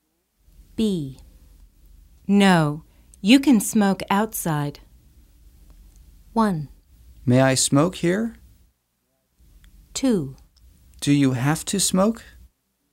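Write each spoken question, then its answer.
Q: No, you can smoke outside.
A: 1: May I smoke here?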